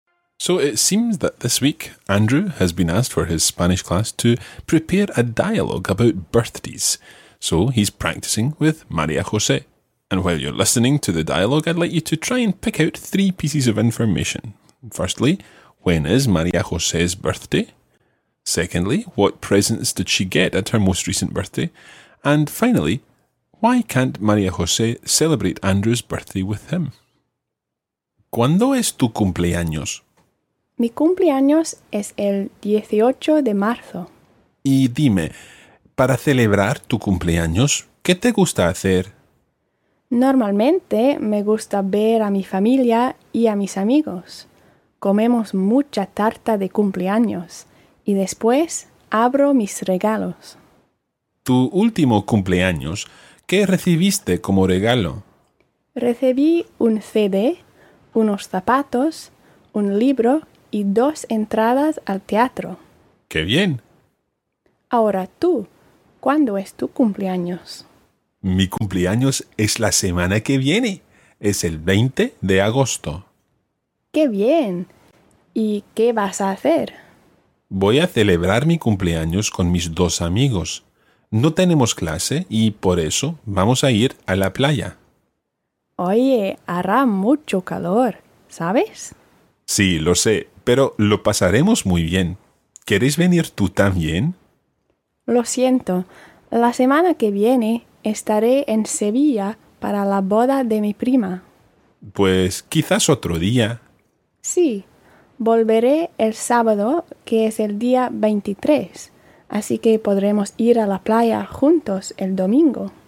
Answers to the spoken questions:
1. it was the 18th of March.
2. She got a CD, some shoes, a book, and theatre tickets.
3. Okay, so she's going to her cousin's wedding in Seville.